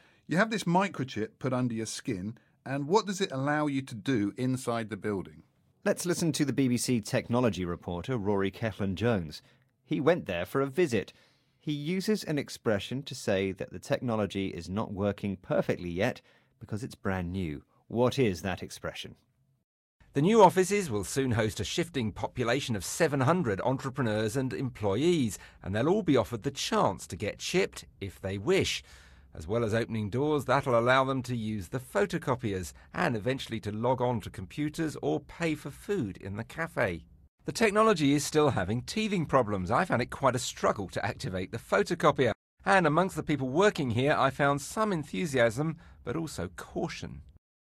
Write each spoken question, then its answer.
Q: What is that expression?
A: The expression is having teething problems.